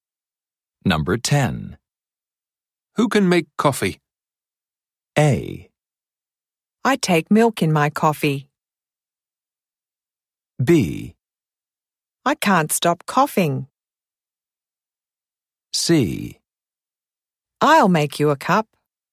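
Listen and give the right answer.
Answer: C: I'll make you a cup.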